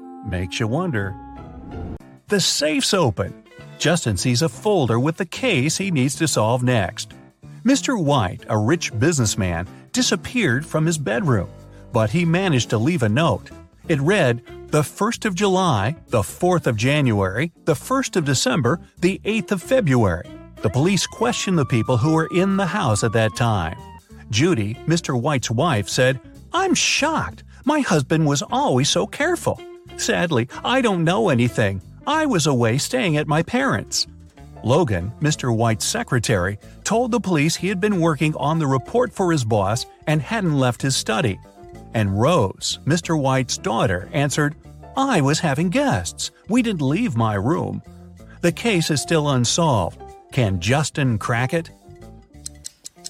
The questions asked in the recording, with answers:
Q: Can Justin crack it?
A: The one behind Mr. White's disappearance is his wife.